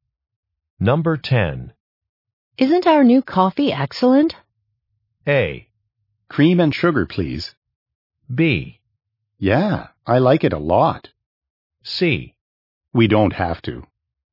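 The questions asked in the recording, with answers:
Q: Isn't our new coffee excellent?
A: B: Yeah, I like it a lot.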